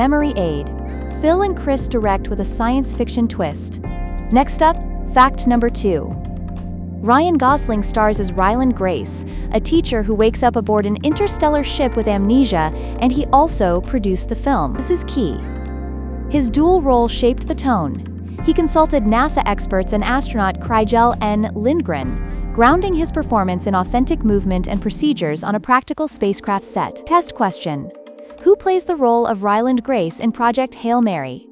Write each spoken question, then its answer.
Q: Who plays the role of Ryland Grace in Project Hail Mary?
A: Correct answer. Ryan Gosling.